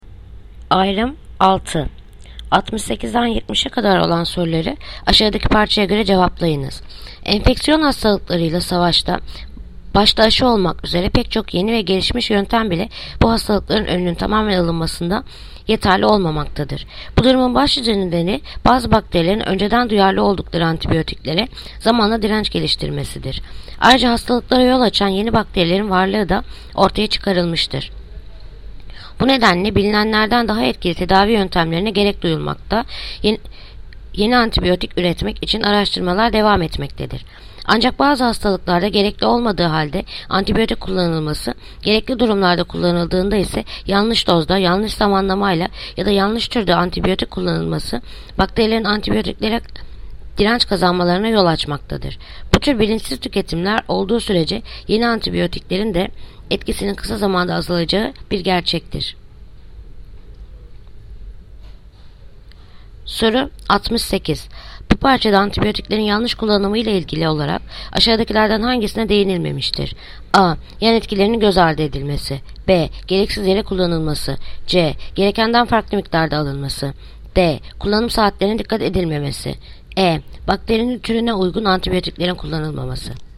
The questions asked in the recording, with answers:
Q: Bu parçada antibiyotiklerin yanlış kullanımı ile ilgili olarak aşağıdakilerden hangisine değinilmemiştir?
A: Yanıt Adana. Yan etkilerinin göz ardı edilmesi.